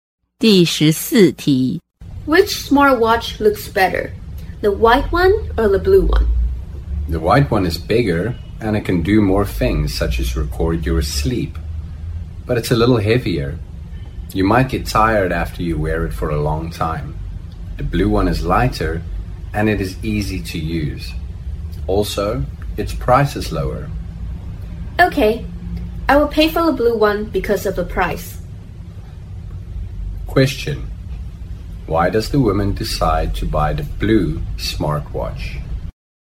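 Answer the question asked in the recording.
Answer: Its price is lower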